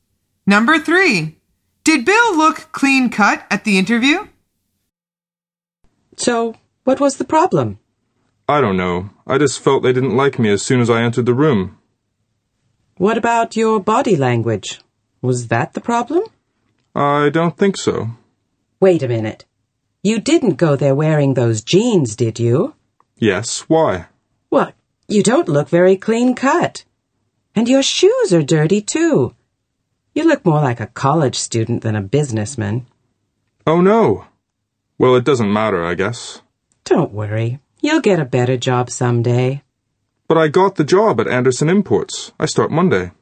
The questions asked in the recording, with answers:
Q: Did Bill look clean-cut at the interview?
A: The answer is no, he didn't.